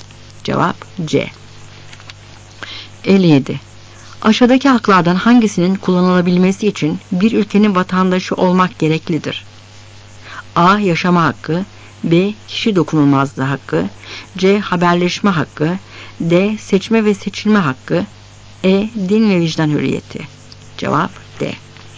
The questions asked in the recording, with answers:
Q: Aşağıdaki haklardan hangisinin kullanılabilmesi için bir ülkenin vatandaşı olmak gereklidir?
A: Cevap D.